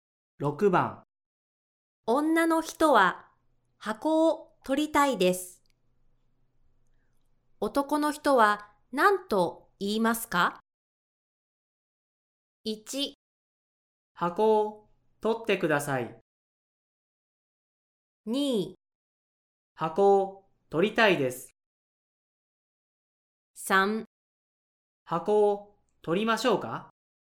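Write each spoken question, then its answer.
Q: 女の人は箱を取りたいです。男の人は何と言いますか?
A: 3: 箱を取りましょうか?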